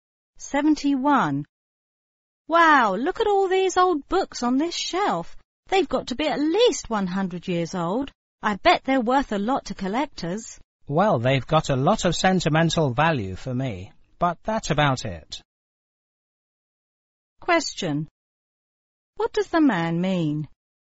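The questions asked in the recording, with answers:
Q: What does the man mean?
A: The books are not valuable except sentimentally to him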